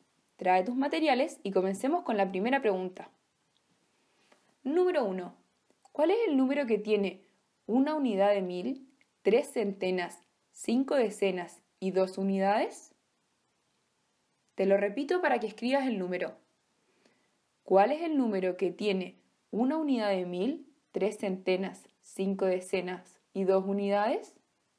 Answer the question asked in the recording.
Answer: Muy bien, es el número 1352